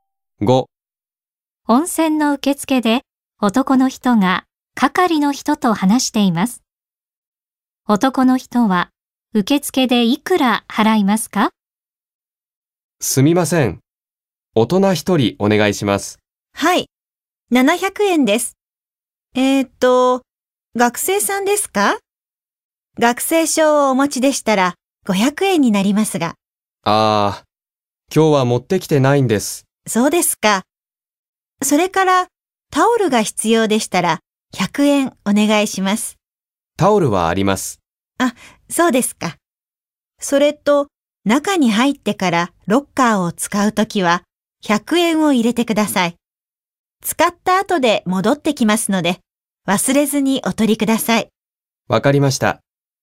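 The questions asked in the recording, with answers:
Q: 男の人は受付でいくら払いますか?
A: 700円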